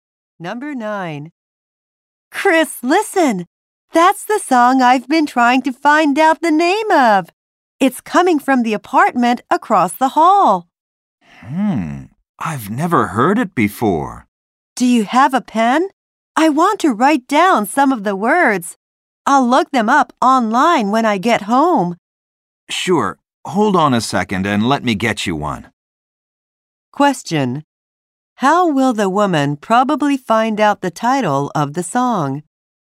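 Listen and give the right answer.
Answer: By looking up the words online.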